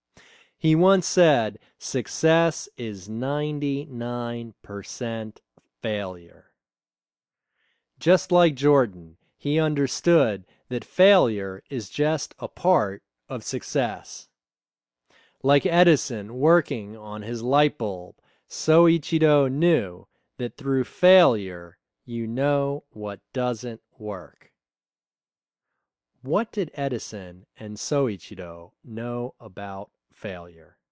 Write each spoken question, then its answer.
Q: What did Edison and Soichiro know about failure?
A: They knew that through failure, you know what doesn't work.